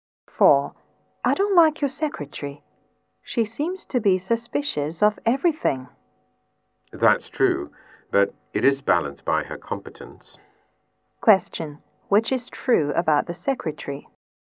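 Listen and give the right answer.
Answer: She is suspicious but competent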